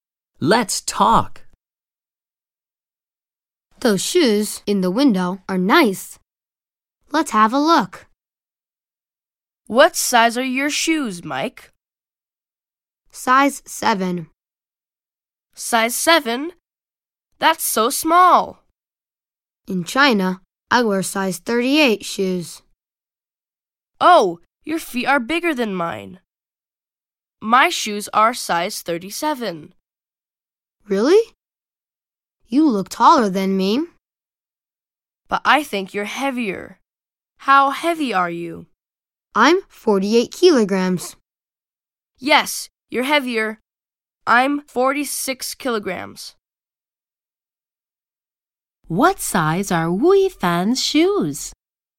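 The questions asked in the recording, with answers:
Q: What size are Wui Fan's shoes?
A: Size 37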